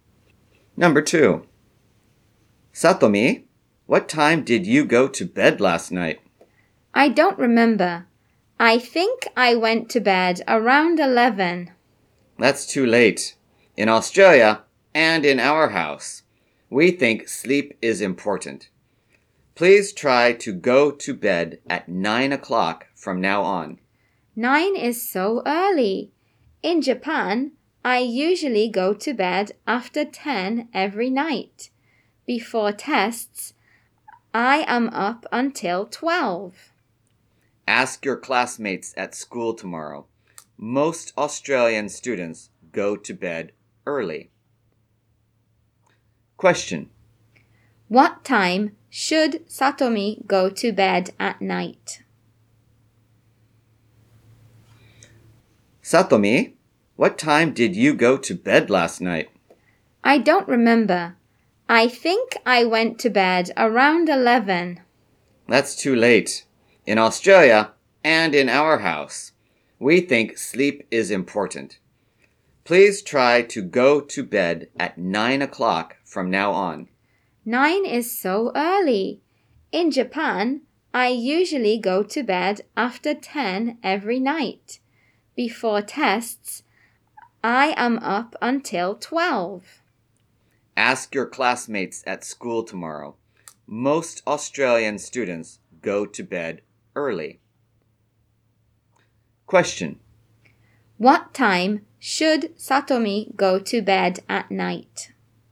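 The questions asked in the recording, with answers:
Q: What time should Satomi go to bed at night?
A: At 9 o'clock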